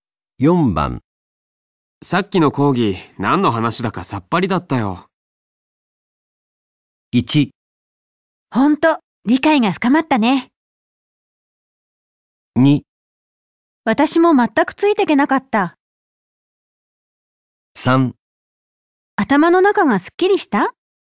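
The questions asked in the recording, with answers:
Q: さっきの講義何の話だかさっぱりだったよ。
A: 2: 私も全くついていけなかった。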